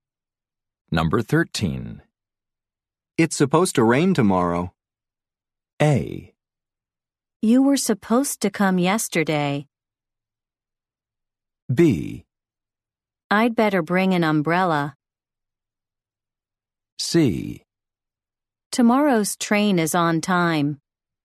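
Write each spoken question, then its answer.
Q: It's supposed to rain tomorrow.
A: B: I'd better bring an umbrella.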